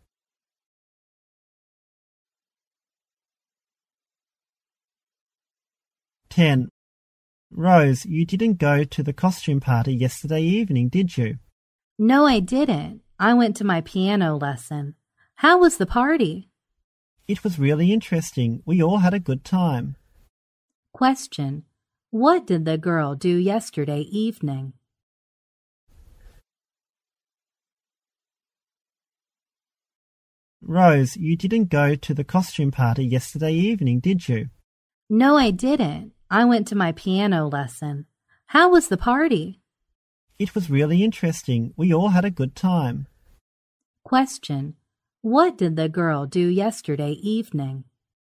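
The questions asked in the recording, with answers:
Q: What did the girl do yesterday evening?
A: She went to her piano lesson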